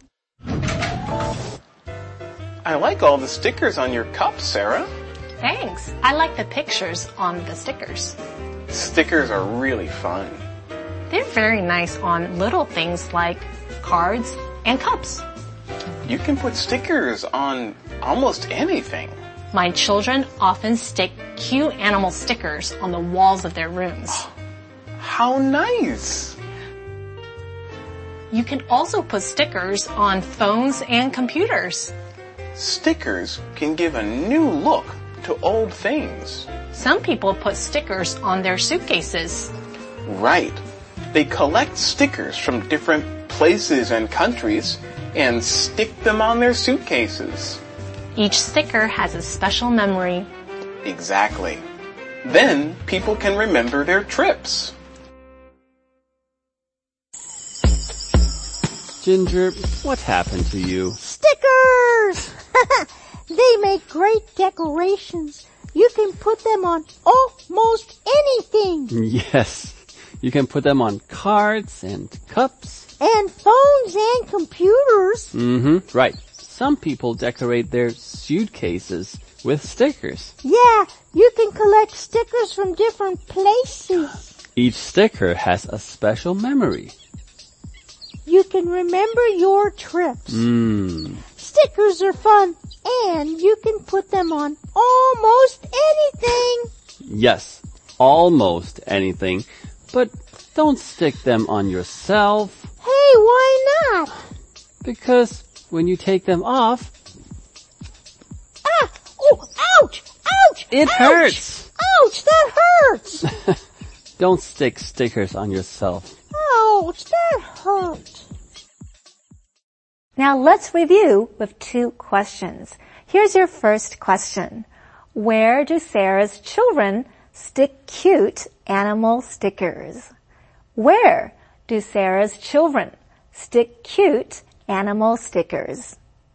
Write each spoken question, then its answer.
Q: Where do Sarah's children stick cute animal stickers?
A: They stick cute animal stickers on the walls of their rooms.